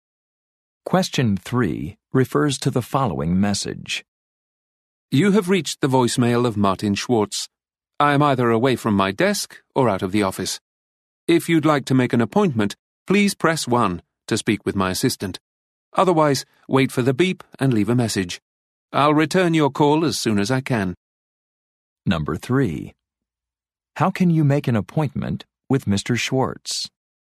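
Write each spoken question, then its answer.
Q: How can you make an appointment with Mr.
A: Press 1 to speak with his assistant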